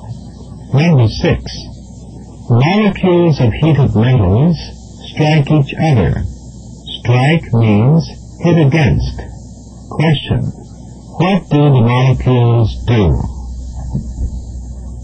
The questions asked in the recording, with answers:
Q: what do the molecules do?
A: hit against each other.